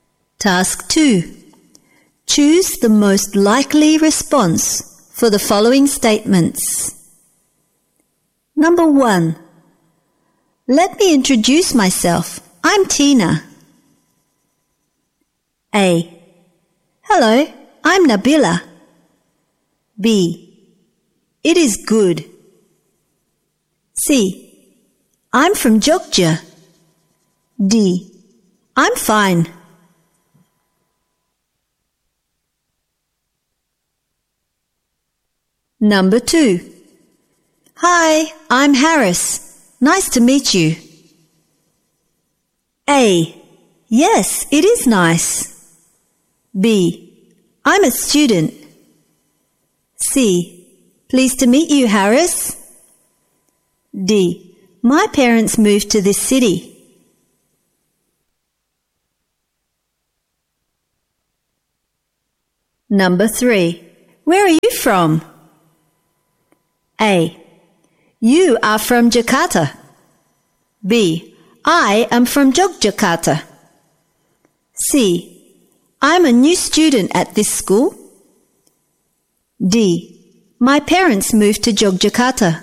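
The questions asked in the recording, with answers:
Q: Where are you from?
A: B: I am from Yogyakarta.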